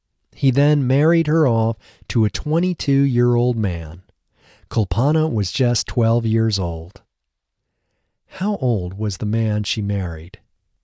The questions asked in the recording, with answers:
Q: How old was the man she married?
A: The man she married was 22 years old.